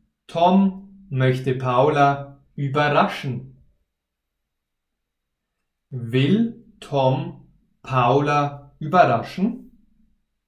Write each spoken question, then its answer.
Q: Will Tom Paula überraschen?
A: Ja, er will Paula überraschen.